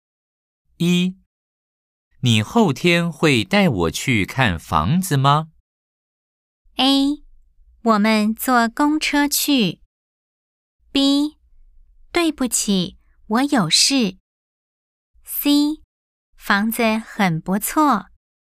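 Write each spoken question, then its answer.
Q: 你后天会带我去看房子吗?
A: B: 对不起,我有事。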